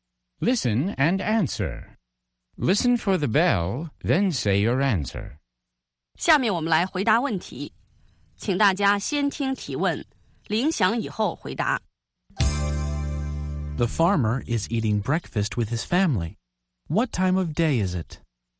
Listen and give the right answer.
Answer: It's morning.